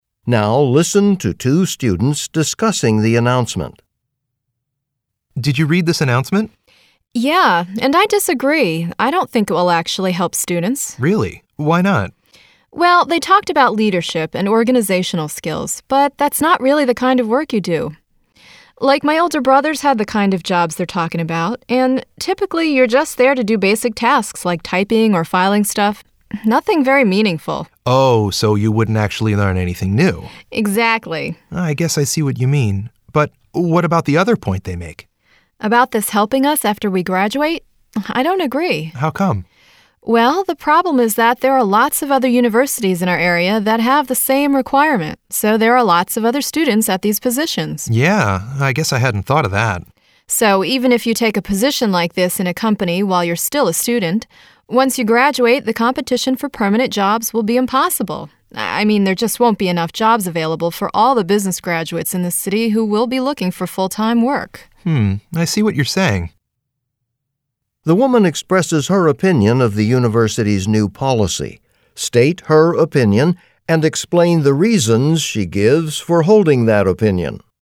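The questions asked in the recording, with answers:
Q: The woman expresses her opinion of the university's new policy. State her opinion and explain the reasons she gives for holding that opinion.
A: She disagrees with it. First, students only do basic tasks like typing or filing, so they won't learn leadership or organizational skills. Second, many nearby universities have the same requirement, so after graduation there will be too much competition and not enough full-time jobs.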